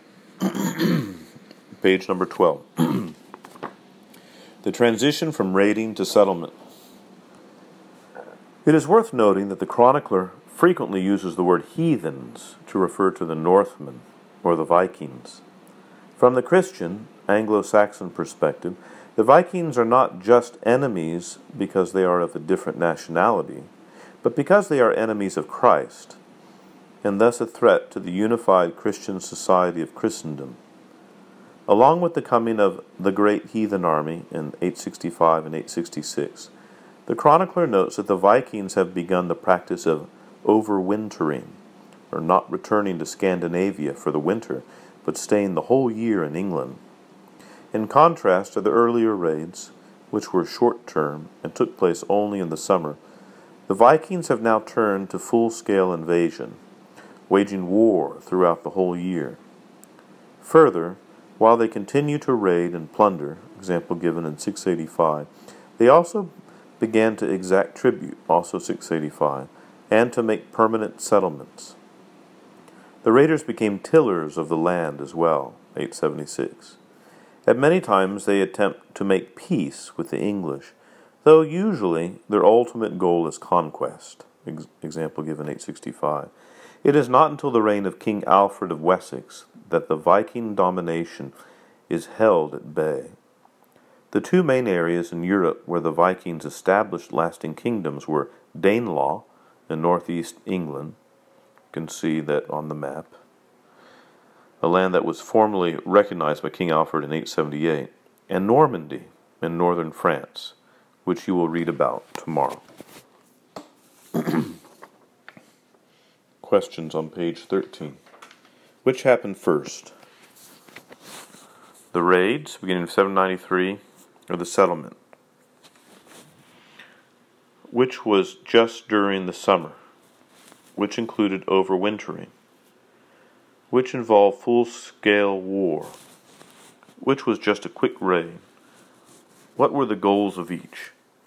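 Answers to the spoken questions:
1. The raids
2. The raids
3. The settlement (full-scale invasion)
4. The settlement (full-scale invasion)
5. The earlier raids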